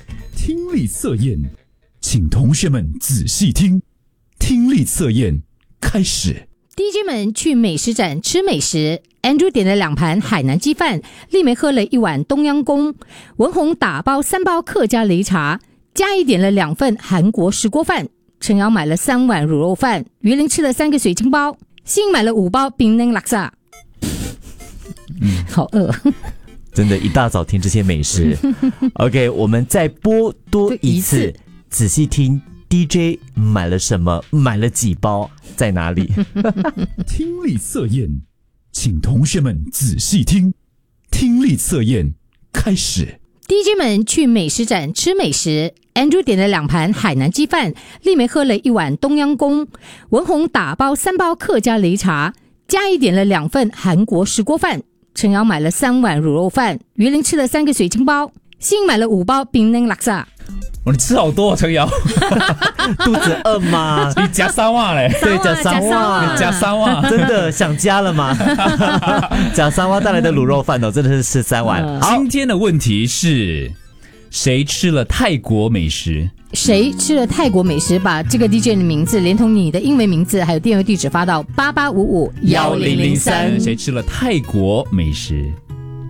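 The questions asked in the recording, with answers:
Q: 谁吃了泰国美食?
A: 丽梅(喝了一碗冬阴功)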